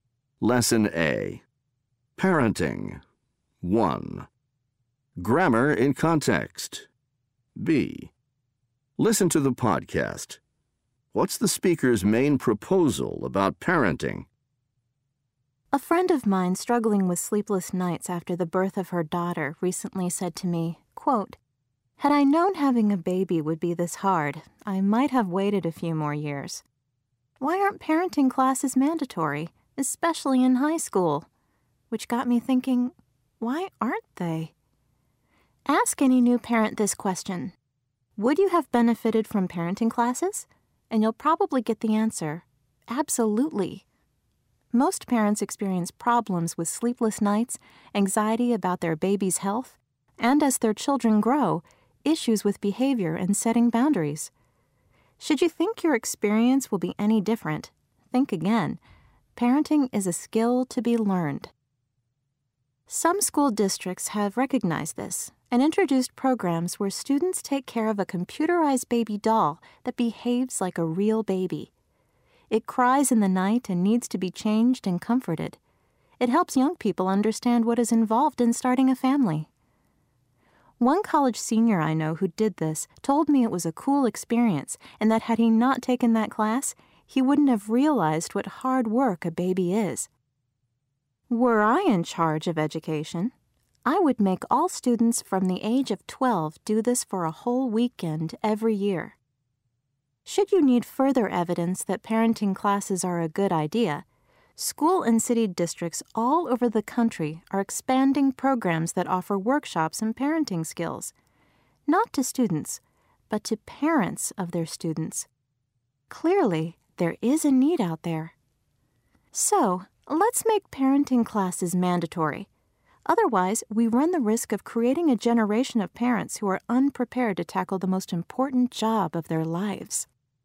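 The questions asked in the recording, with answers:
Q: What's the speaker's main proposal about parenting?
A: Parenting classes should be mandatory, especially in high school.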